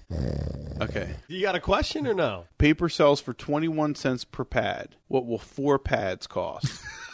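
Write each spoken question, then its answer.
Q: What will four pads cost?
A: 84 cents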